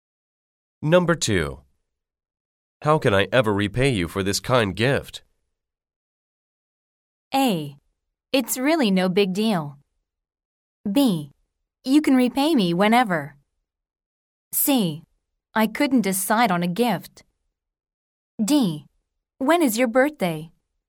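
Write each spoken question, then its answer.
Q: How can I ever repay you for this kind gift?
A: A: It's really no big deal.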